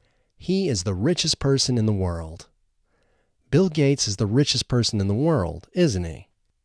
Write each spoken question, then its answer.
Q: Bill Gates is the richest person in the world, isn't he?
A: Yes, Bill Gates is the richest person in the world.